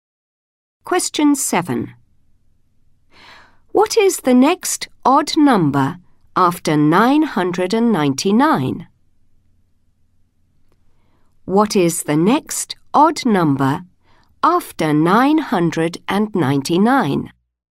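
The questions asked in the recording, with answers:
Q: What is the next odd number after 999?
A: 1001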